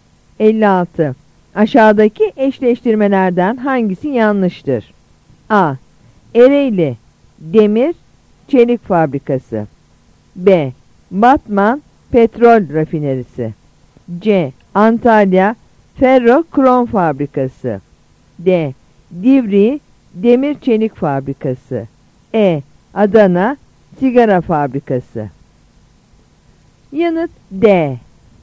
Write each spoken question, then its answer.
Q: Aşağıdaki eşleştirmelerden hangisi yanlıştır?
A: Yanıt D.